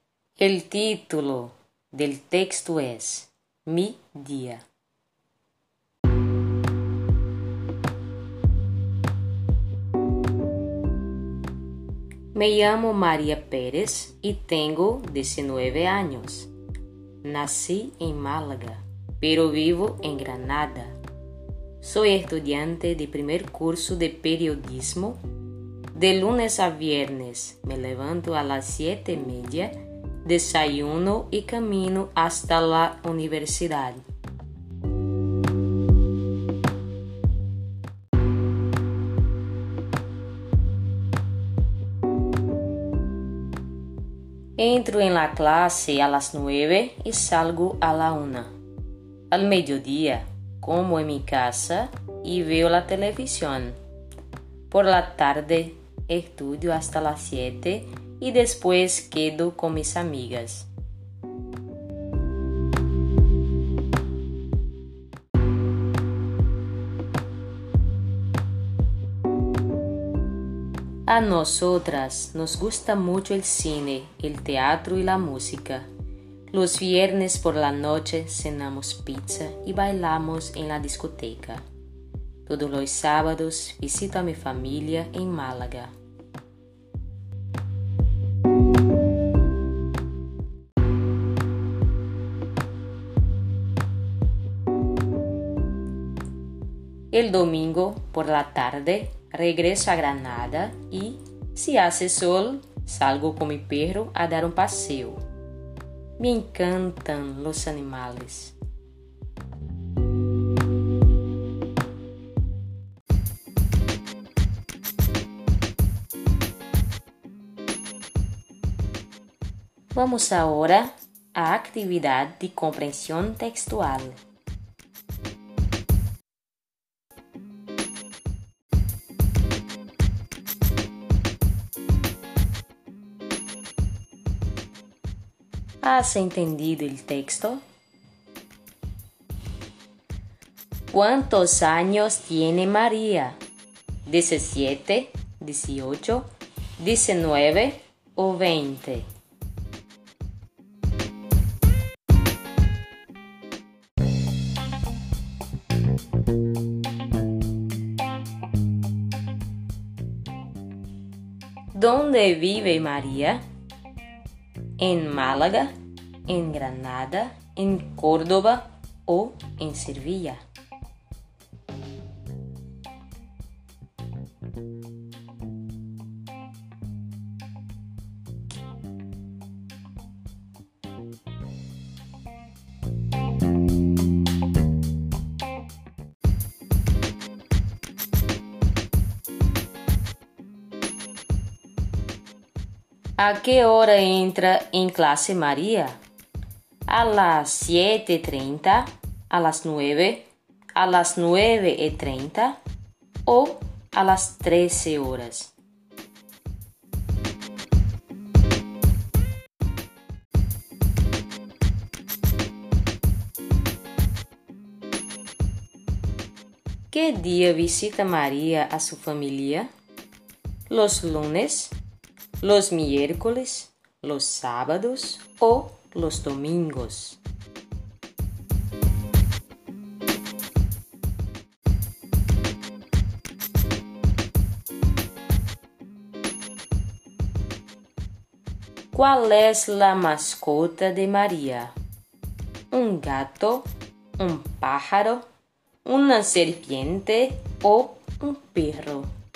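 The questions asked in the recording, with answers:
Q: ¿Cuántos años tiene María?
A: 19

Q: ¿Dónde vive María?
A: En Granada

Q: A que hora entra em classe Maria?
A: A las nueve

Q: Que dia visita Maria a sua família?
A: Los sábados

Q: ¿Cuál es la mascota de María?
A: Un perro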